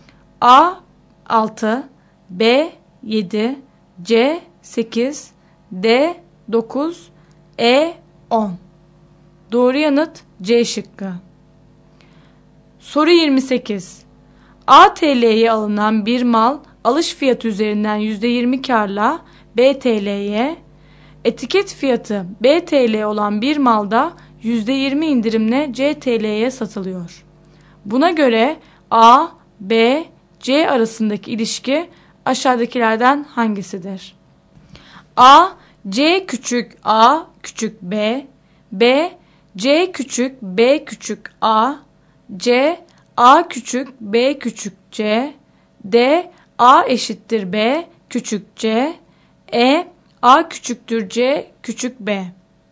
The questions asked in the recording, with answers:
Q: Buna göre A, B, C arasındaki ilişki aşağıdakilerden hangisidir?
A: Doğru yanıt A şıkkı.